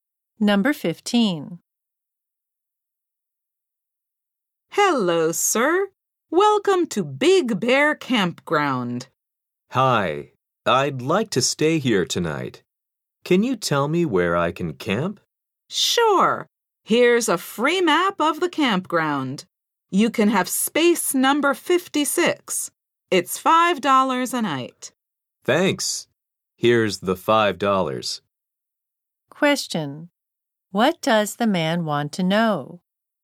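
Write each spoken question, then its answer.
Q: What does the man want to know?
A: Where he can camp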